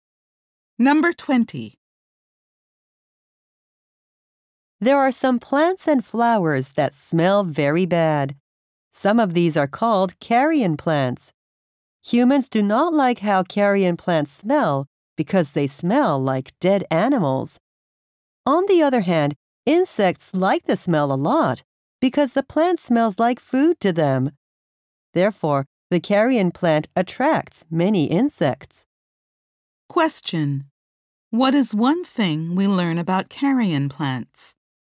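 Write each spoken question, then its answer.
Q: What is one thing we learn about carrion plants?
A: They attract many insects.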